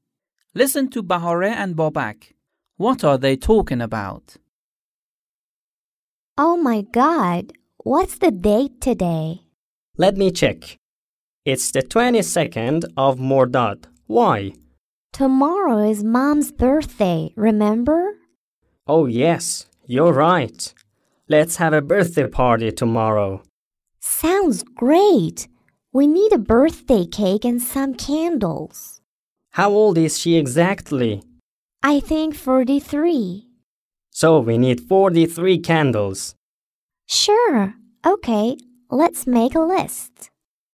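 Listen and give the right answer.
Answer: Their mom's birthday party tomorrow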